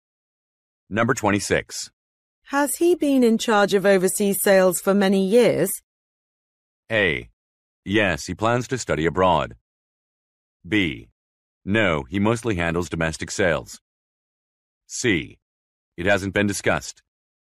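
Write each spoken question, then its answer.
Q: Has he been in charge of overseas sales for many years?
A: B: No, he mostly handles domestic sales.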